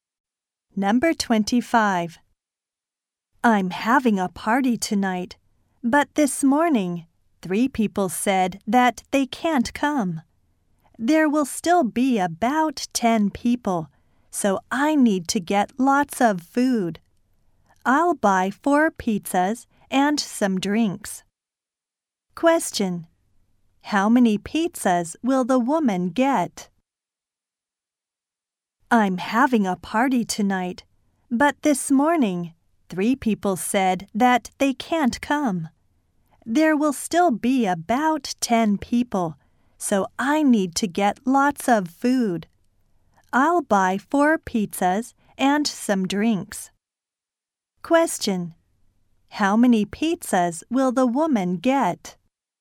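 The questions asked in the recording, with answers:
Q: How many pizzas will the woman get?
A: Four.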